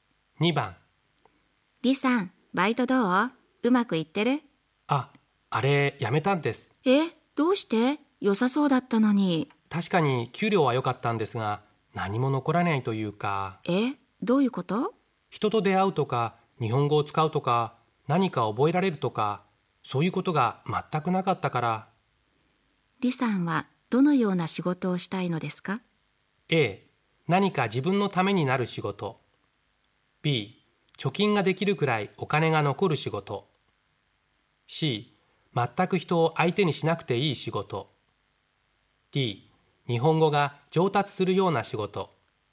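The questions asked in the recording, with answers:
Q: 李さんはどのような仕事をしたいのですか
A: A: 何か自分のためになる仕事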